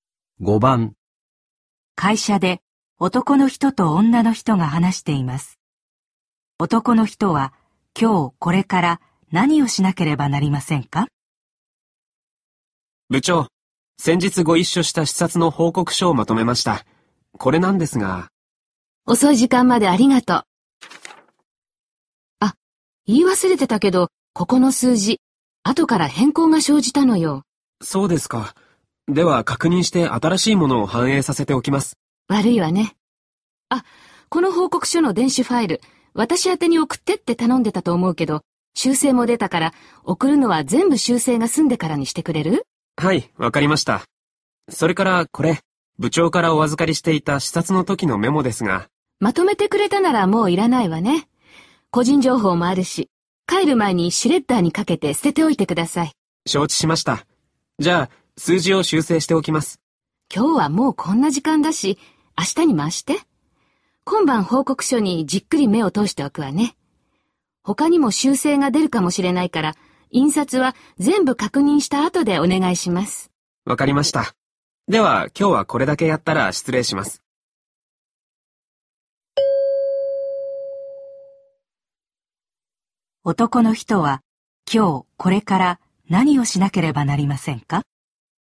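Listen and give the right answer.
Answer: メモをシュレッダーにかけて捨てる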